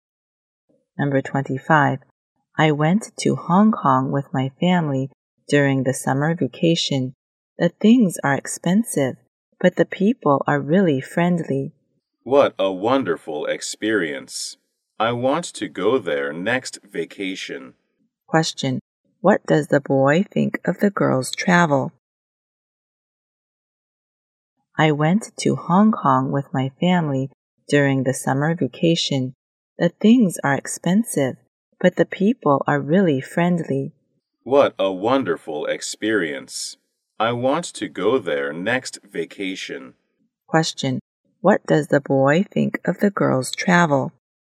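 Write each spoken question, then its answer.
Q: What does the boy think of the girl's travel?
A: Wonderful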